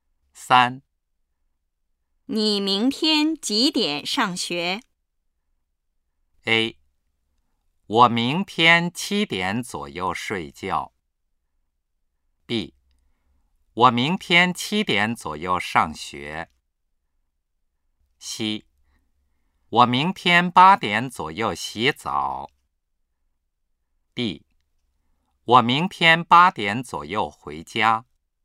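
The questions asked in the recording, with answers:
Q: 你明天几点上学?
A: B: 我明天7点左右上学。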